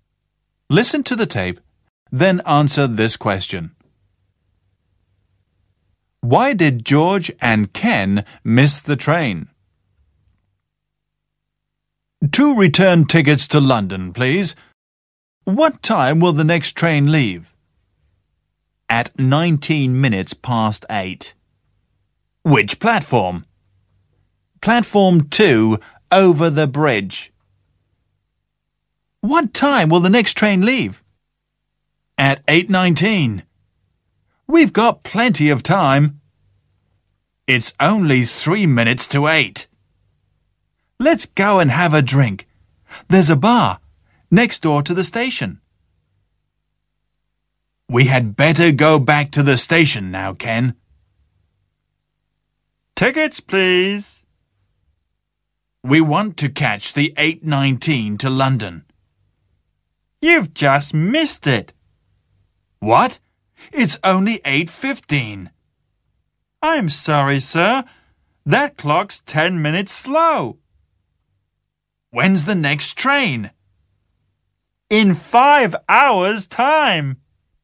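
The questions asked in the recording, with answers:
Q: Why did George and Ken miss the train?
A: Because the clock in the bar was 10 minutes slow.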